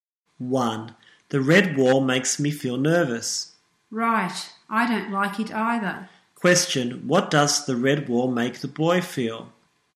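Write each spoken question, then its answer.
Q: Question, what does the red wall make the boy feel?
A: Nervous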